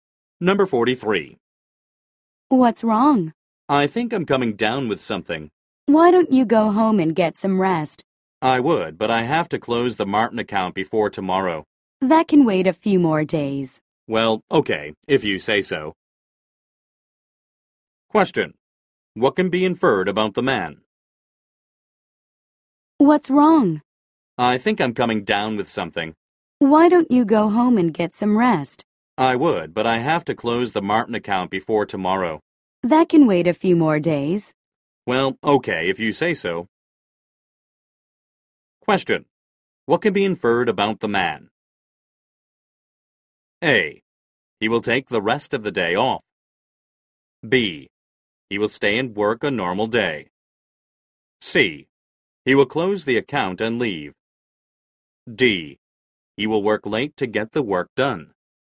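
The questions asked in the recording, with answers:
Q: What can be inferred about the man?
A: A: He will take the rest of the day off.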